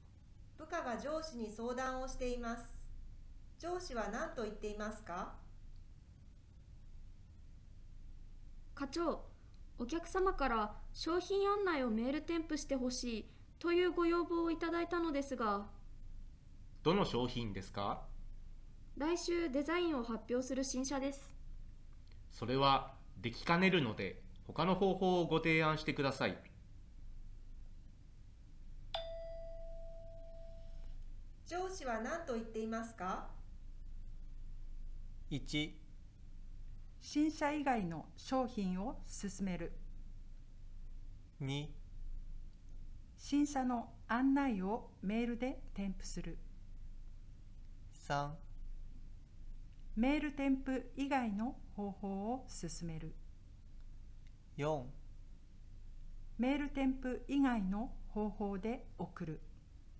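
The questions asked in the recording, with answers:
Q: 上司は何と言っていますか?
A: 3: メール添付以外の方法を進める。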